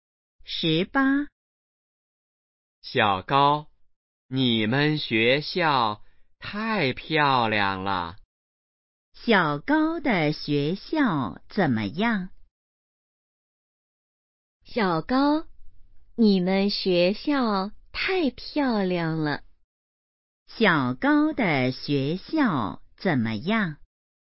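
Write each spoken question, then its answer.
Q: 小高的学校怎么样?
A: 很漂亮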